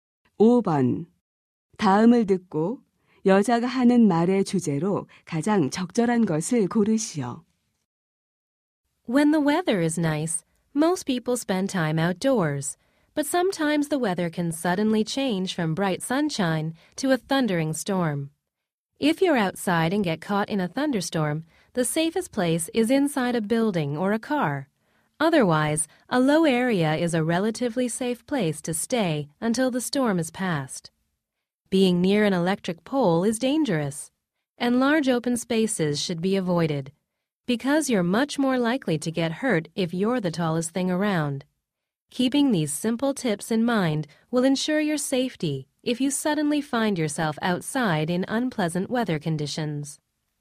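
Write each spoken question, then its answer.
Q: 다음을 듣고 여자가 하는 말의 주제로 가장 적절한 것을 고르시오.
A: 야외에서 뇌우를 만났을 때의 안전 수칙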